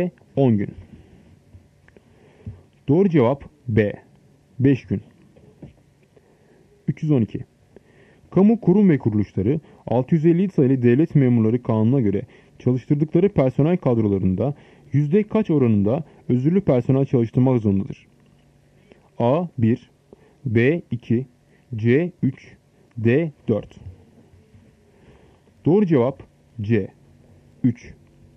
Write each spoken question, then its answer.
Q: Kamu kurum ve kuruluşları 650 sayılı devlet memurları kanununa göre çalıştırdıkları personel kadrolarında yüzde kaç oranında özürlü personel çalıştırmak zorundadır?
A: Doğru cevap C 3.